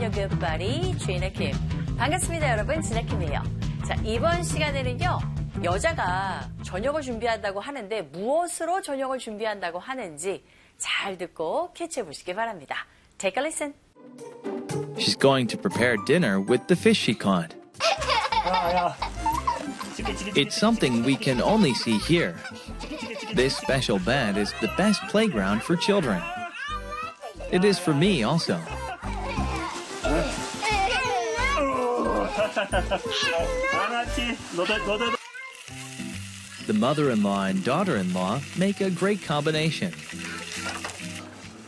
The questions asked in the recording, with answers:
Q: 여자가 저녁을 준비한다고 하는데 무엇으로 저녁을 준비한다고 하는지 잘 듣고 캐치해 보시기 바랍니다.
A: 자, 잡은 물고기로 그 생선으로 저녁을 준비한다고 하죠.